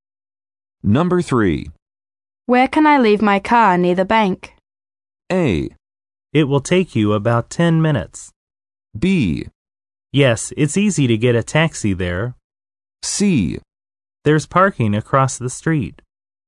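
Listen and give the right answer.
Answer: C: There's parking across the street.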